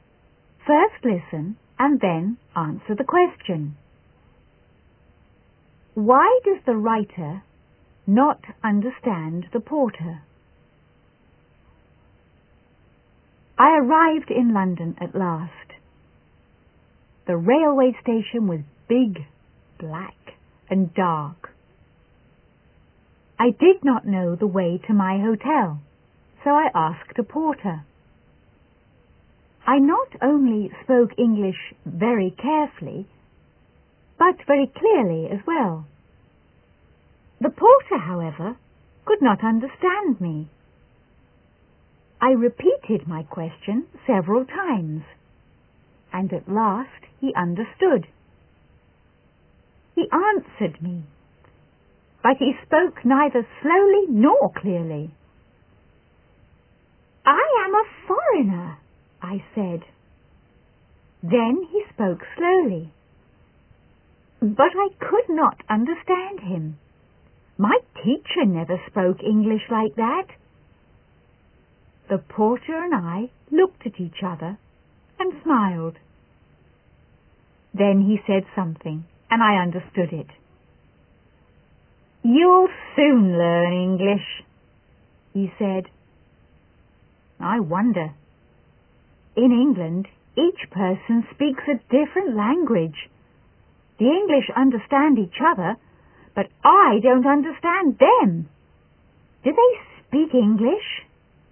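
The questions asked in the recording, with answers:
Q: Why does the writer not understand the porter?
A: Because the porter spoke neither slowly nor clearly; in England each person speaks a different language.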